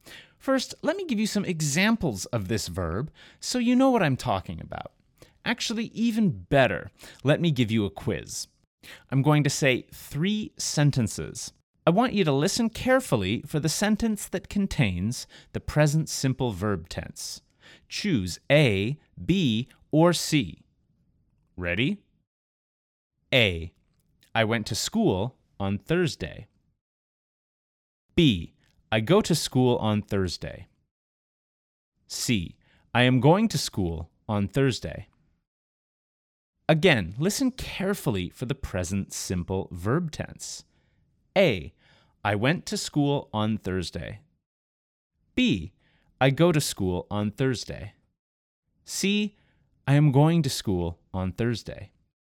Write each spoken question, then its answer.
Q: I want you to listen carefully for the sentence that contains the present simple verb tense.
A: The answer is B.